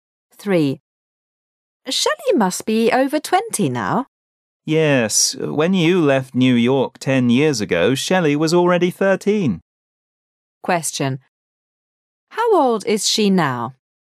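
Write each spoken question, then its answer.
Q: How old is she now?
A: 23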